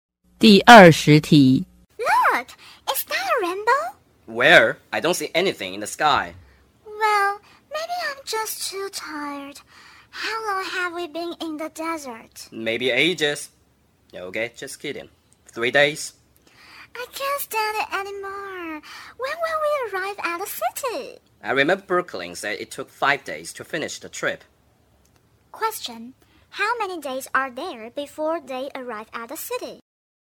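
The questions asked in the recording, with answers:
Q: Question: how many days are there before they arrive at the city?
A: 2 days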